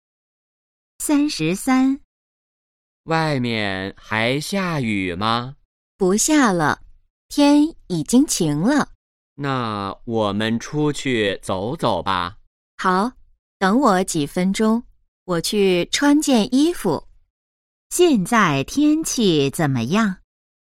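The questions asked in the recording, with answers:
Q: 现在天气怎么样?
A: 晴了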